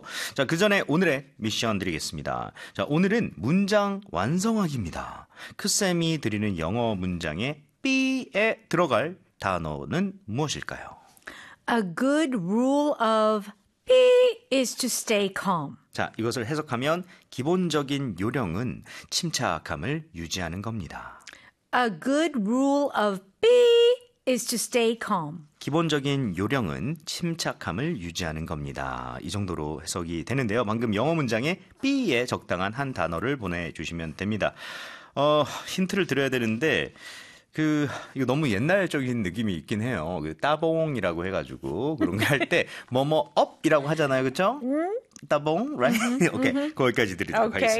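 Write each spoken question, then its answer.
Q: 크쌤이 드리는 영어 문장에 B에 들어갈 단어는 무엇일까요? A good rule of B is to stay calm.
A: thumb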